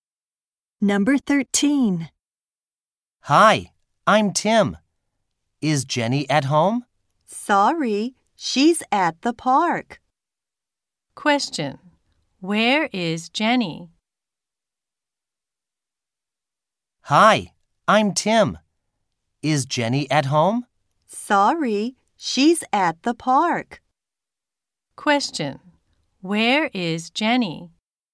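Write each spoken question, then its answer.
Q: Where is Jenny?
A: At the park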